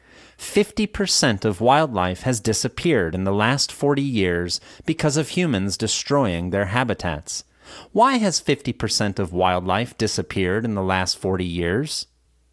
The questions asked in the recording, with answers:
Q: Why has 50% of wildlife disappeared in the last 40 years?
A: 50% of wildlife has disappeared in the last 40 years because of humans destroying their habitats.